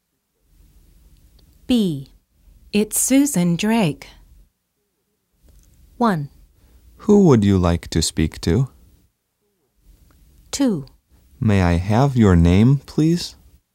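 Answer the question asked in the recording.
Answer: 2: May I have your name, please?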